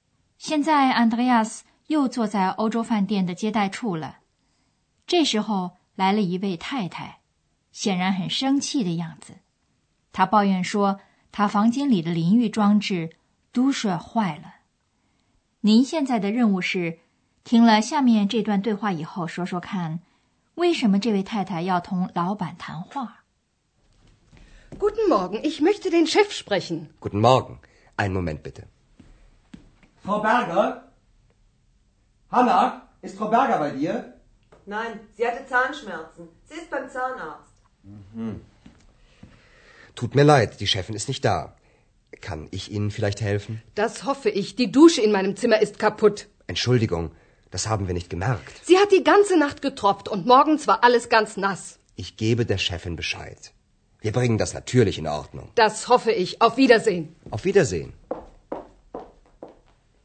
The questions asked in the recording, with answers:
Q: 为什么这位太太要同老板谈话?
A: 这位太太要找饭店的老板谈话,是因为她房间里的淋浴设备坏了。